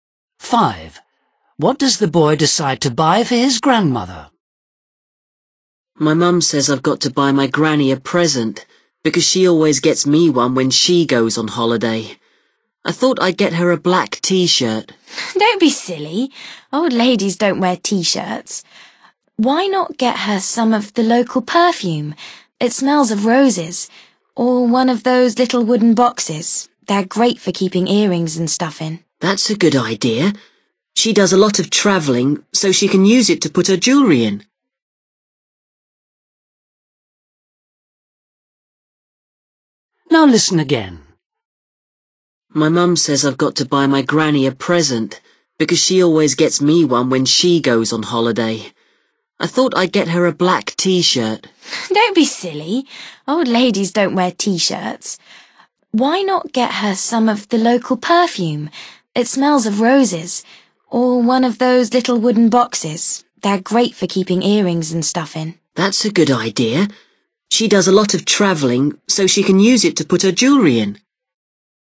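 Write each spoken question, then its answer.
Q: What does the boy decide to buy for his grandmother?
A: a little wooden box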